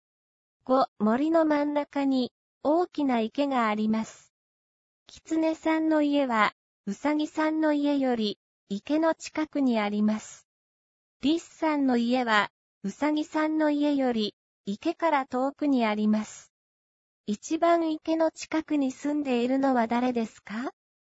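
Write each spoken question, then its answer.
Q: 一番池の近くに住んでいるのは誰ですか?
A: キツネさん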